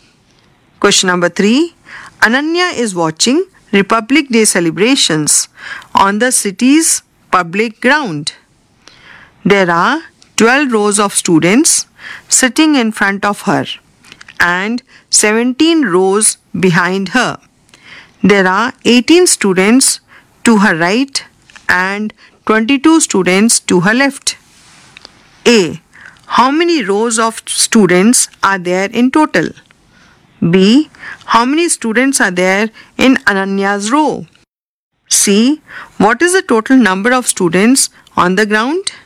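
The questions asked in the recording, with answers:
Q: How many rows of students are there in total?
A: 30

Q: How many students are there in Ananya's row?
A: 41

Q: What is the total number of students on the ground?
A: 1230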